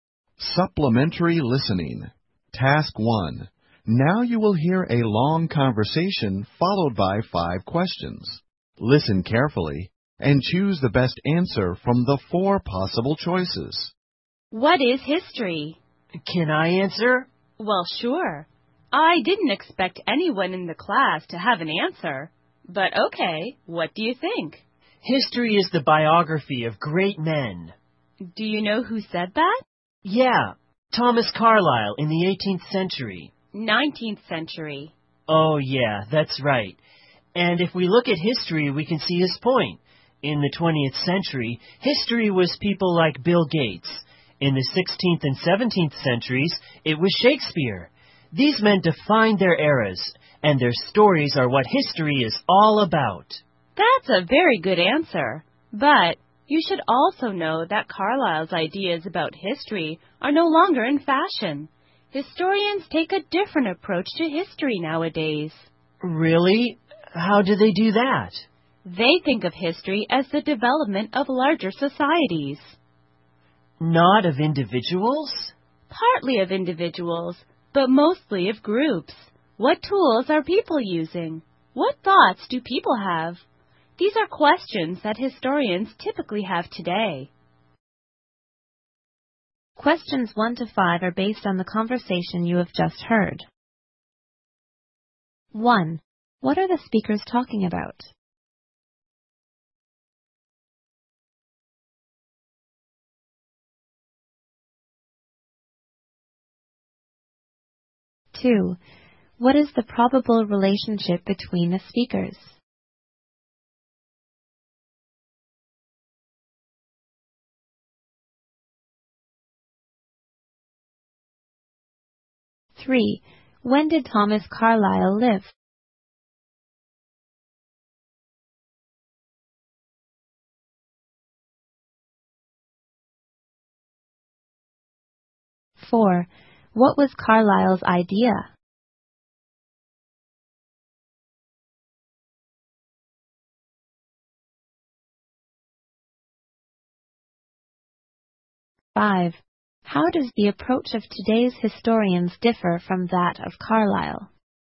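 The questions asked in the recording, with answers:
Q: What are the speakers talking about?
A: What history is

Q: What is the probable relationship between the speakers?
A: Teacher and student

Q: When did Thomas Carlyle live?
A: In the 19th century

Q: What was Carlyle's idea?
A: History is the biography of great men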